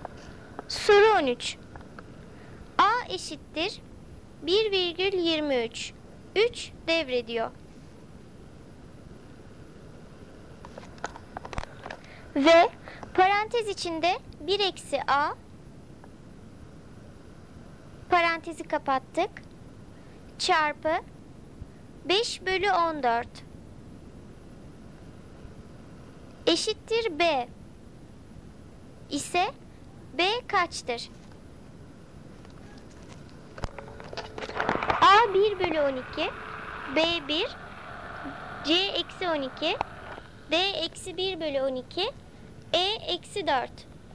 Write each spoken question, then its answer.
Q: eşittir B ise B kaçtır?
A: Doğru cevap D eksi 1 bölü 12.